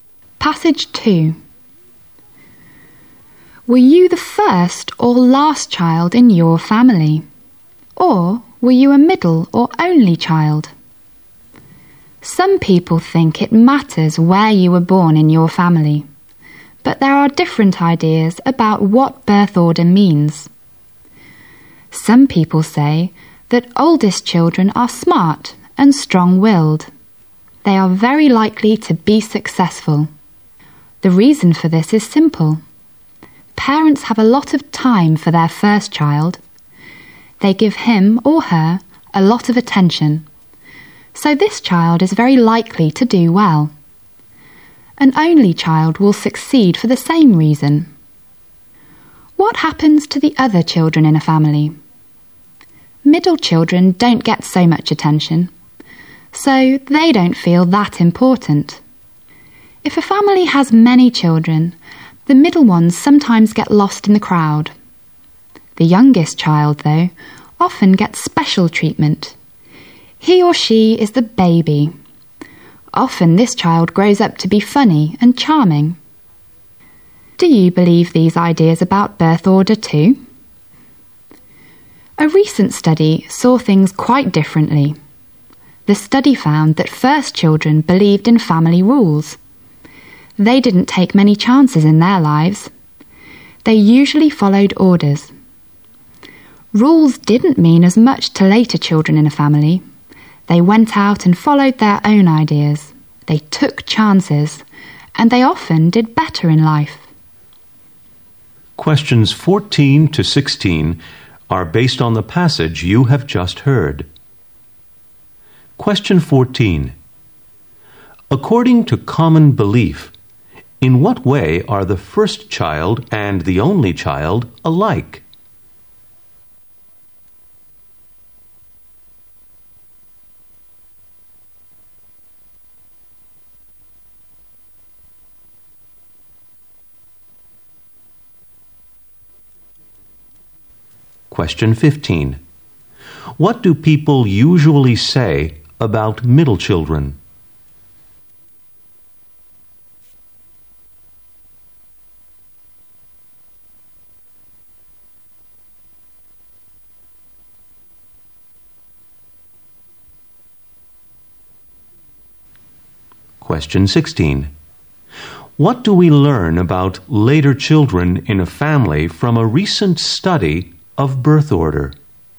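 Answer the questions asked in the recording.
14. They are likely to be successful because they get a lot of parental attention
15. They don't get much attention and don't feel important
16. They follow their own ideas, take chances, and often do better in life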